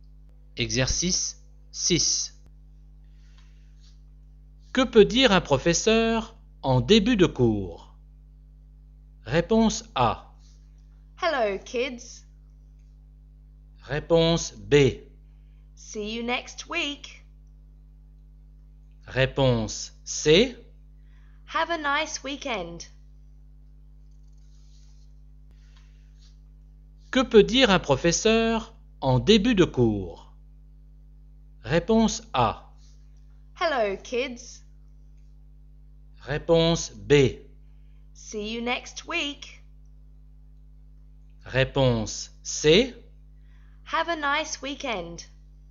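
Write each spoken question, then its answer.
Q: Que peut dire un professeur en début de cours?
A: A: Hello, kids.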